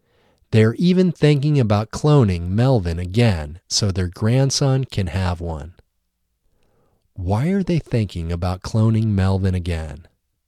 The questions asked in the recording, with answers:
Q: Why are they thinking about cloning Melvin again?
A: They are thinking about cloning Melvin again so their grandson can have one.